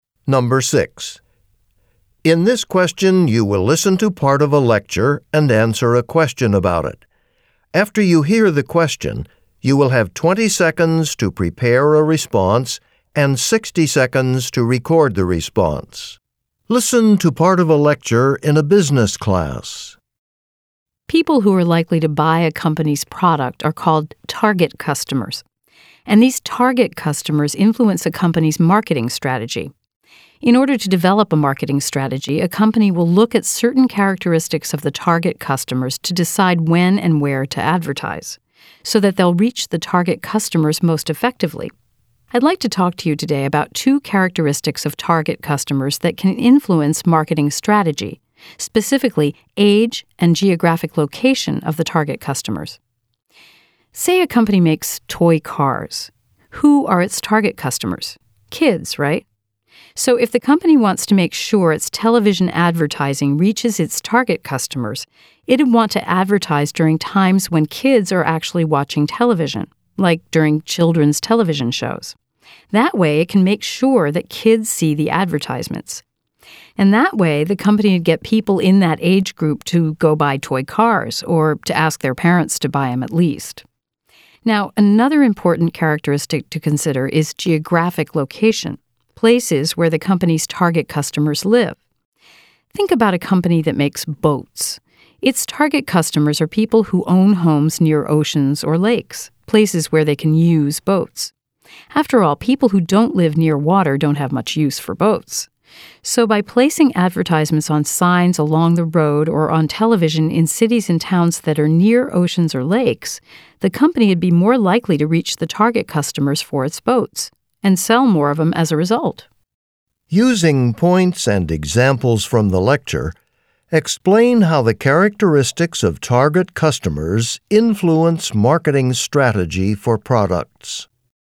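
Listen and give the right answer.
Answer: Companies advertise where and when target customers will see the ads. Age: a toy car maker advertises during children's TV shows so kids see the ads. Location: a boat maker advertises on road signs and TV in towns near oceans or lakes.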